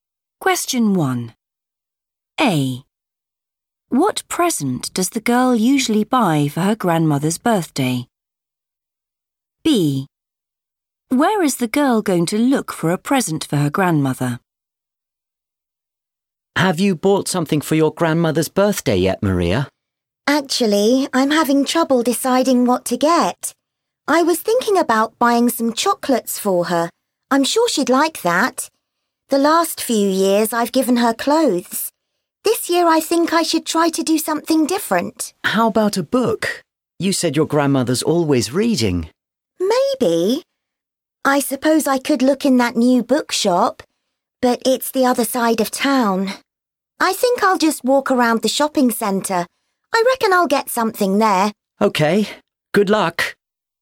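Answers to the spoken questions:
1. clothes
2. the shopping centre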